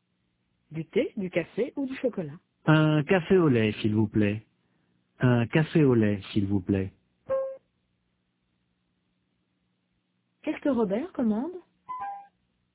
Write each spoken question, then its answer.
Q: Qu'est-ce que Robert commande?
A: Un café au lait.